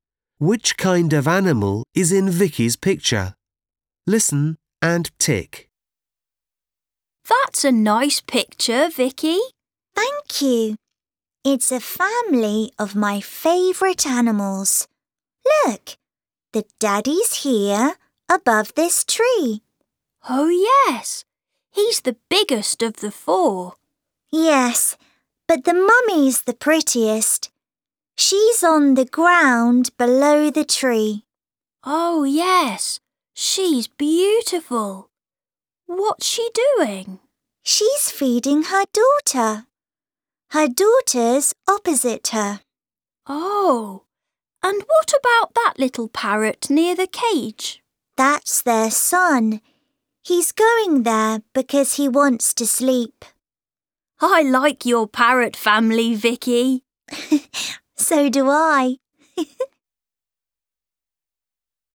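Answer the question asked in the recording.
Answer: parrots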